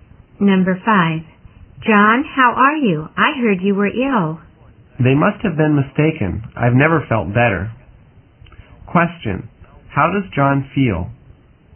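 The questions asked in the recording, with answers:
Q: How does John feel?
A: Very well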